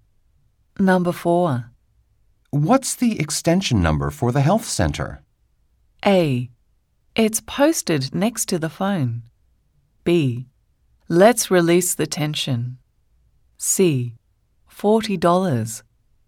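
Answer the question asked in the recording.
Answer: A: It's posted next to the phone.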